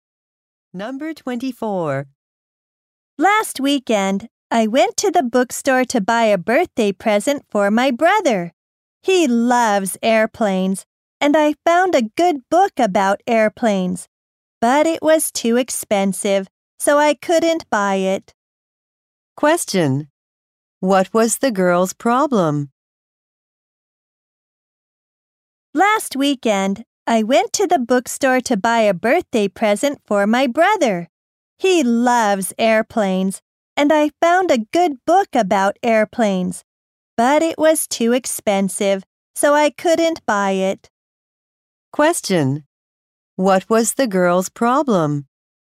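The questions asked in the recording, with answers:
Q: What was the girl's problem?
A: The airplane book was too expensive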